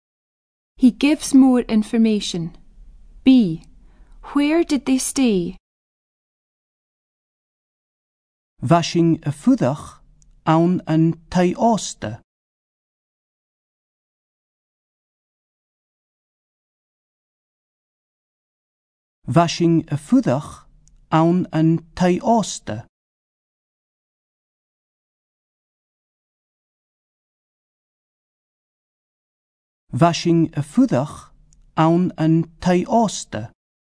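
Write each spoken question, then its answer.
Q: Where did they stay?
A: In a hotel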